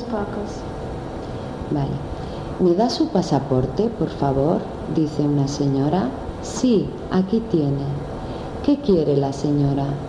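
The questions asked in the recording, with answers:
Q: ¿Qué quiere la señora?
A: Su pasaporte.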